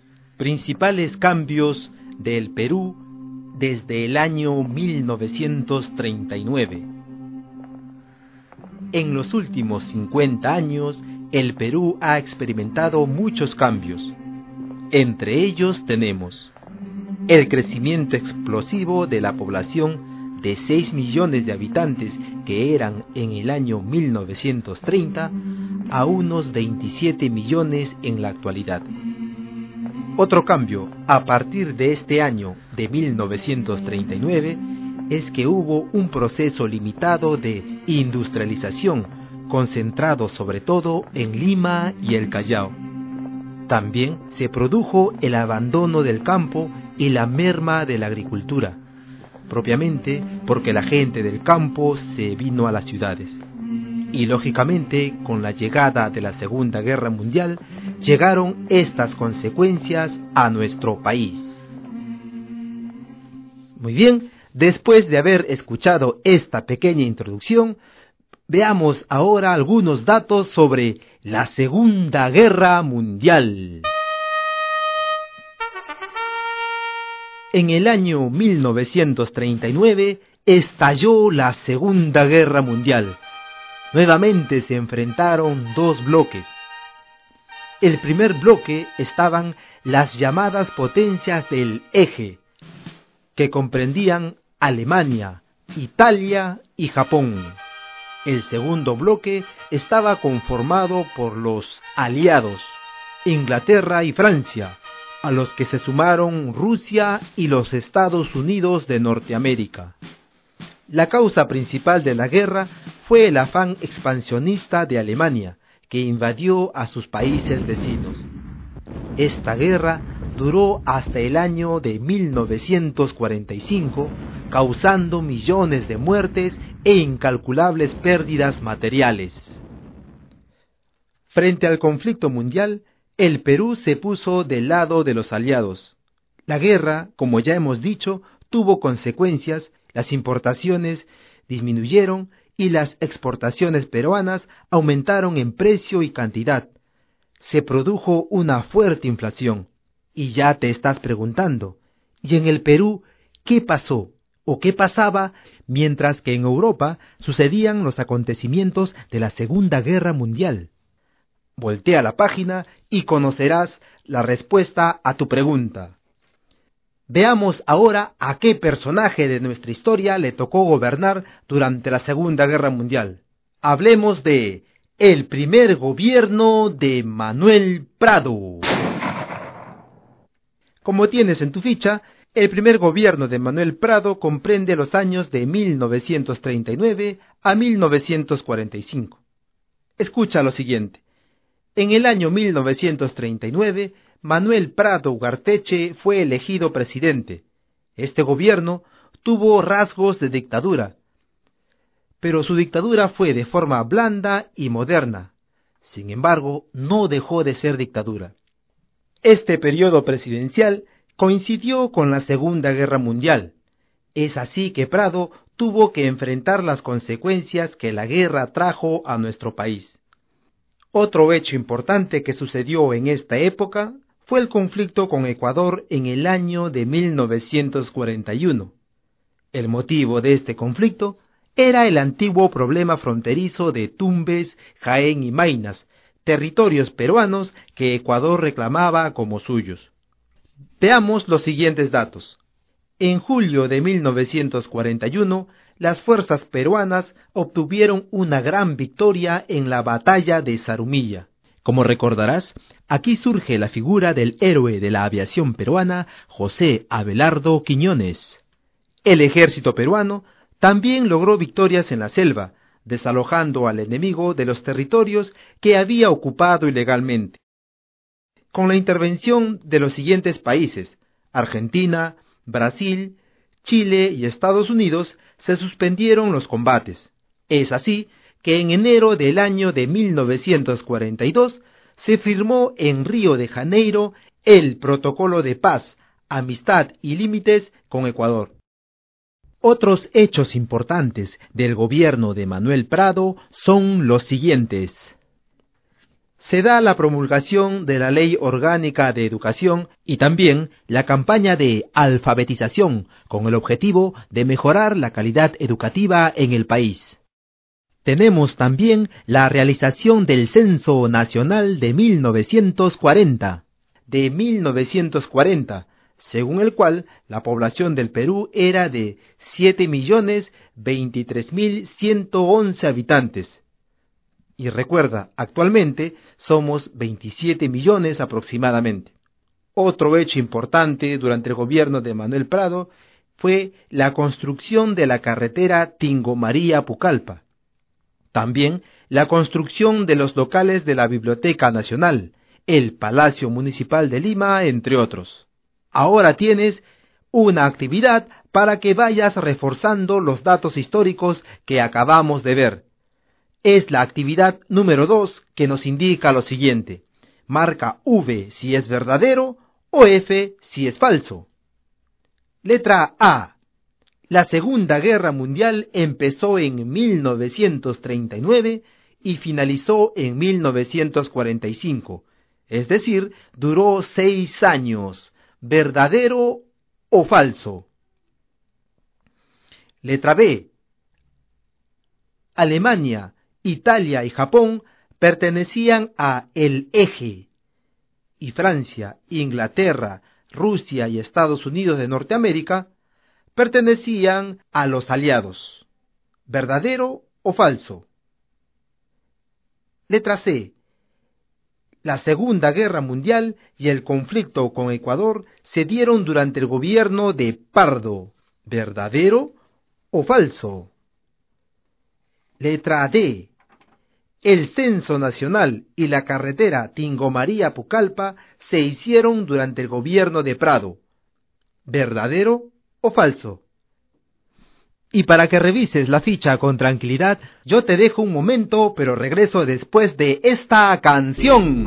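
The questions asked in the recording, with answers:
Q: La Segunda Guerra Mundial empezó en 1939 y finalizó en 1945. Es decir, duró 6 años. ¿Verdadero o falso?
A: Verdadero

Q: Alemania, Italia y Japón pertenecían a el Eje, y Francia, Inglaterra, Rusia y Estados Unidos de Norteamérica pertenecían a los aliados. ¿Verdadero o falso?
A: Verdadero

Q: El Censo Nacional y la carretera Tingo María Pucallpa se hicieron durante el gobierno de Prado. ¿Verdadero o falso?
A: Verdadero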